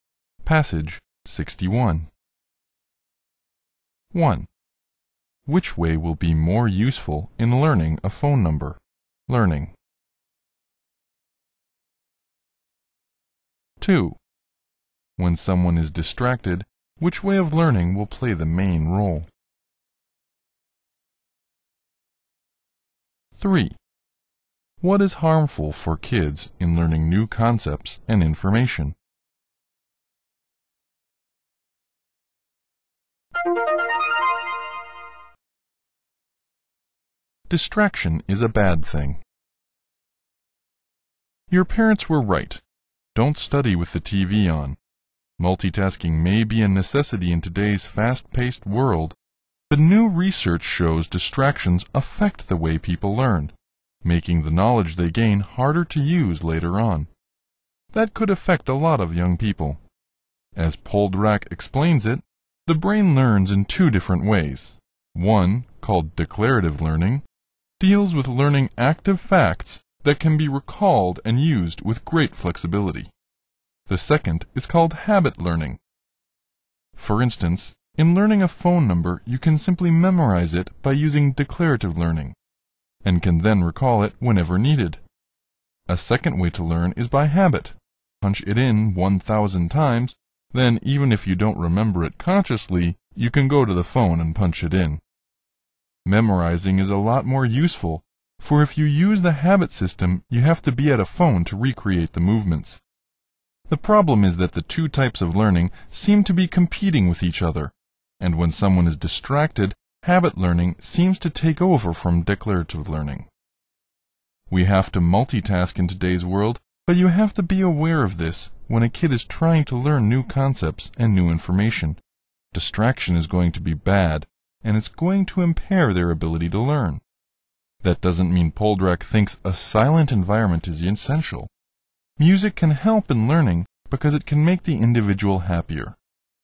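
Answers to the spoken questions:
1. Declarative learning (memorizing)
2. Habit learning
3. Distraction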